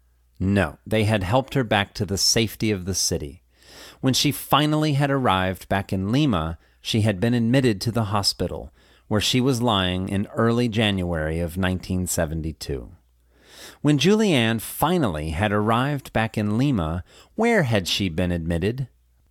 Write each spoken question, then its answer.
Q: When Julianne finally had arrived back in Lima, where had she been admitted?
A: When she finally had arrived back in Lima, she had been admitted to the hospital, where she was lying in early January of 1972.